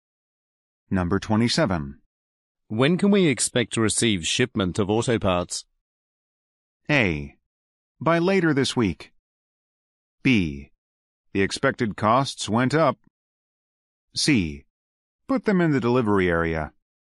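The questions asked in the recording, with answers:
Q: When can we expect to receive shipment of auto parts?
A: A: By later this week.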